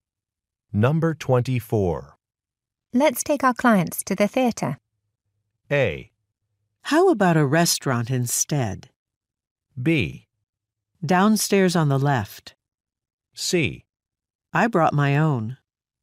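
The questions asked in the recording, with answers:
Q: Let's take our clients to the theater.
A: A: How about a restaurant instead?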